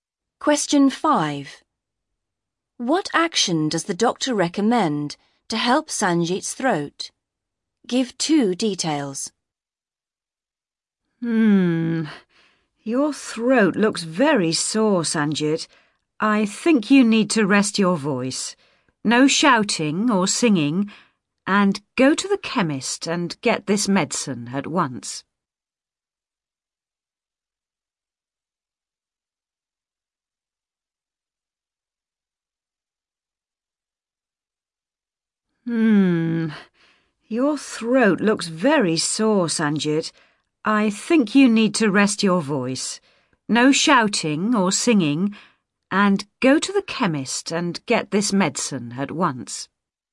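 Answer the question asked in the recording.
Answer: Rest his voice (no shouting or singing) and get medicine from the chemist at once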